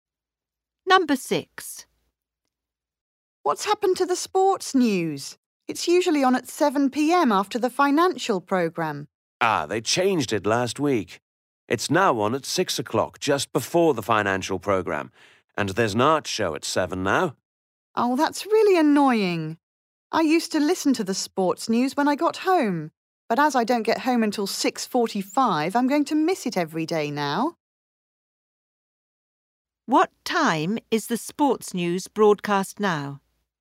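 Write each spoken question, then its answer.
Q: What time is the sports news broadcast now?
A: 6 o'clock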